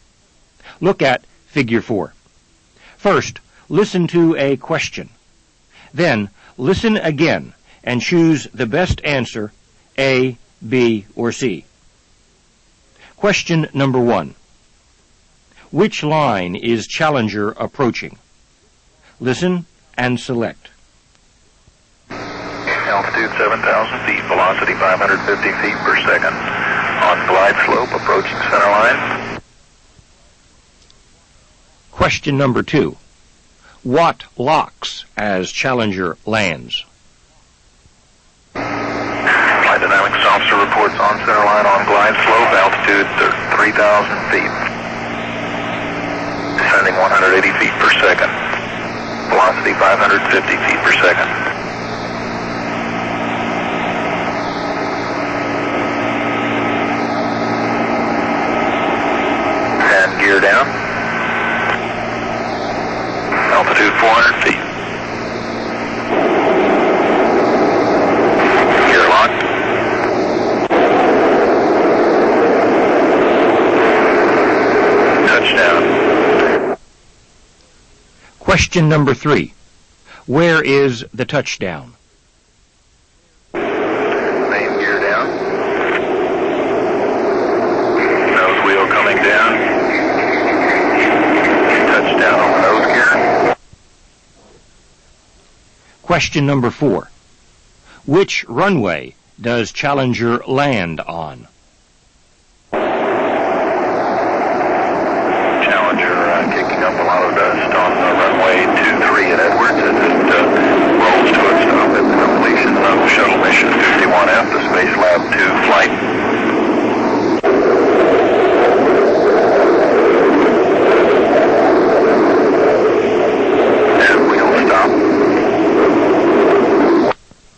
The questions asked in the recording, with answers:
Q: Which line is Challenger approaching?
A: The answer is letter B. Challenger is approaching the center line.

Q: What locks as Challenger lands?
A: The answer is letter B. The gear locks as Challenger lands.

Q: Where is the touchdown?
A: The answer is letter C, the nose gear.

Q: Which runway does Challenger land on?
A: The answer is letter A. Challenger lands on runway 23.